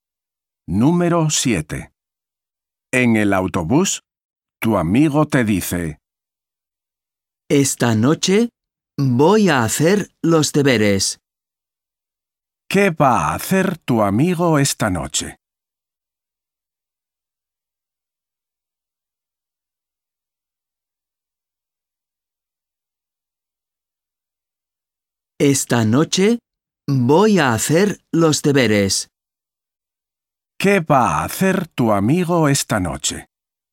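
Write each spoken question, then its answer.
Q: ¿Qué va a hacer tu amigo esta noche?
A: Los deberes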